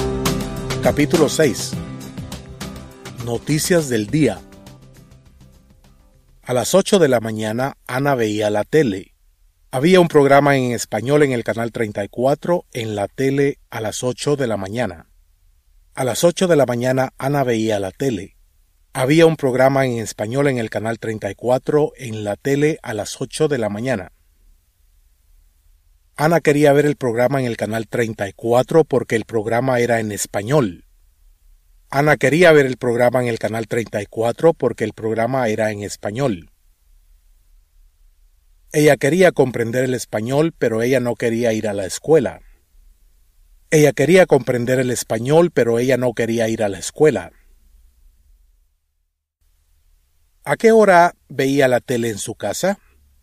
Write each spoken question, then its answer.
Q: ¿A qué hora veía la tele en su casa?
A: Ana veía la tele a las 8 de la mañana.